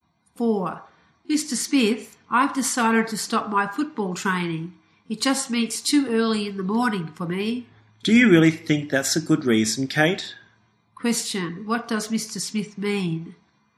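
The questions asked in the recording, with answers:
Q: Question, what does Mr. Smith mean?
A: He doesn't think it's a good reason to stop training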